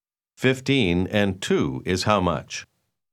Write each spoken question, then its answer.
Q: 15 and 2 is how much?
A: 17.